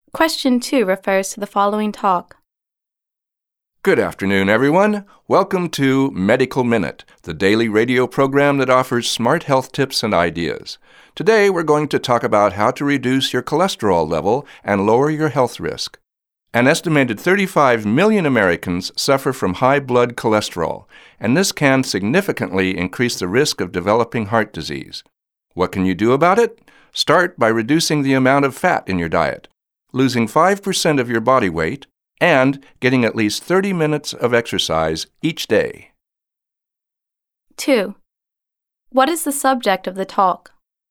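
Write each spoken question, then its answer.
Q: What is the subject of the talk?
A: How to reduce cholesterol levels and lower health risk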